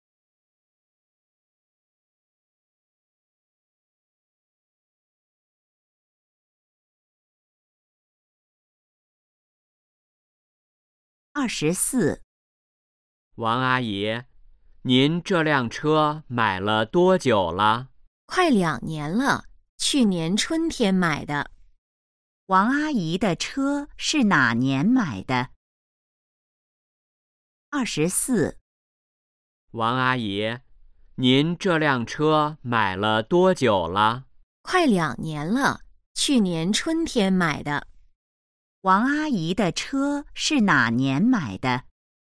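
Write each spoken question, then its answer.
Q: 王阿姨的车是哪年买的?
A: 去年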